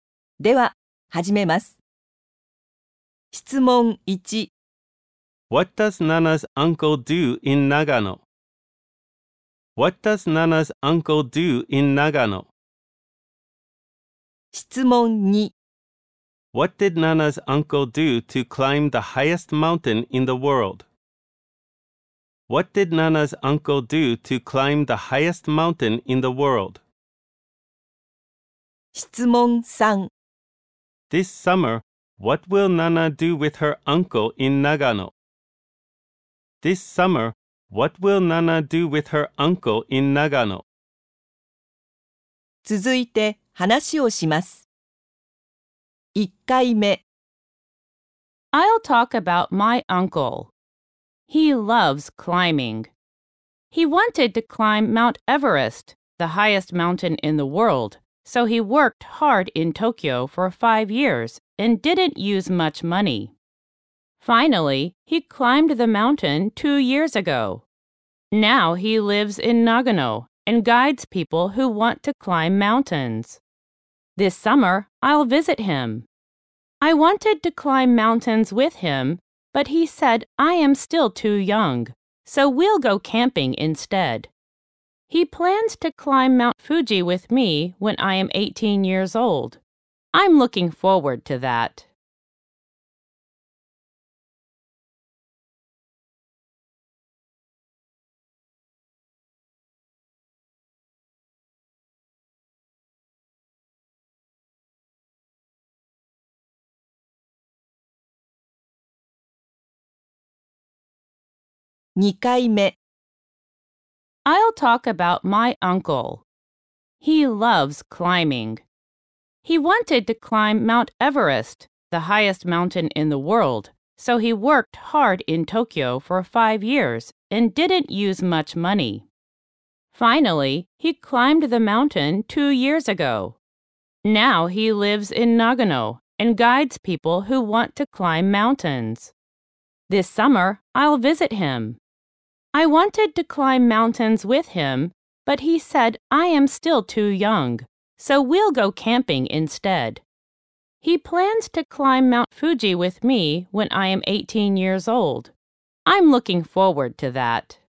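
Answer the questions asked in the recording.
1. He guides people who want to climb mountains.
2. He worked hard in Tokyo for 5 years and didn't use much money.
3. They will go camping.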